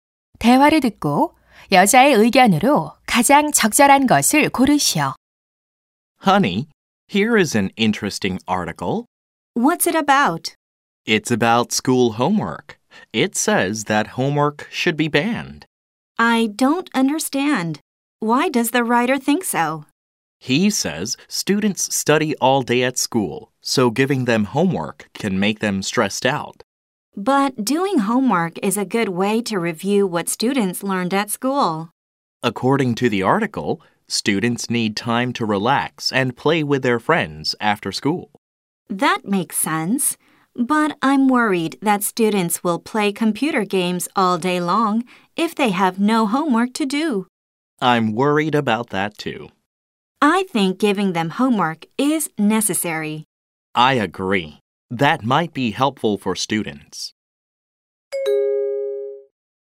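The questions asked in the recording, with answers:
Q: 대화를 듣고 여자의 의견으로 가장 적절한 것을 고르시오.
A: 학생들에게 숙제를 내주는 것은 필요하다.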